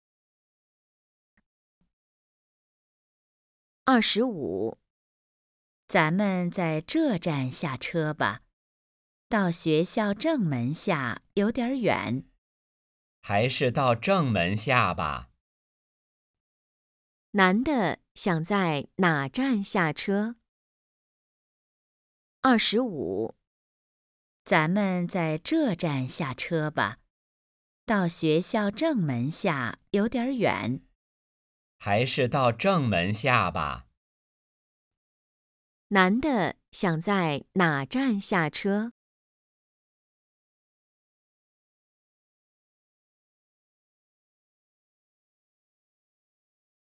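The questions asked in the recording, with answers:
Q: 男的想在哪站下车?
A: 学校正门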